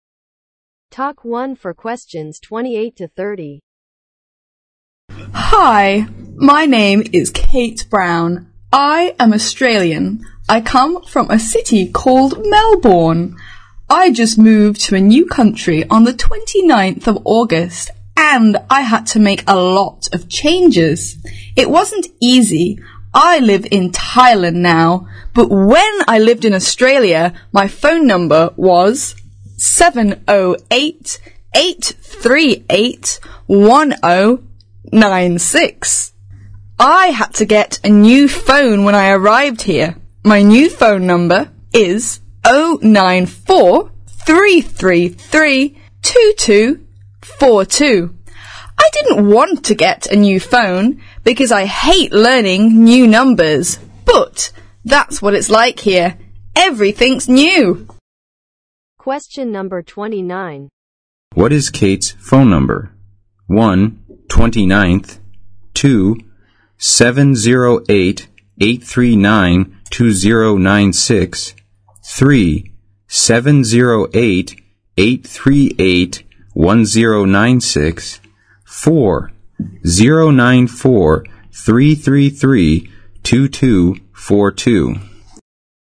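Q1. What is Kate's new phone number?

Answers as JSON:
{"1": "094-333-2242"}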